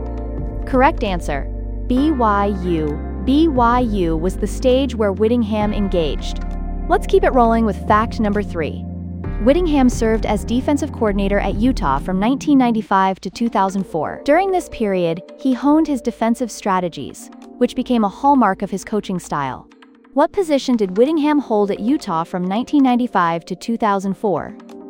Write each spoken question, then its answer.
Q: What position did Whittingham hold at Utah from 1995 to 2004?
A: Correct answer, defensive coordinator.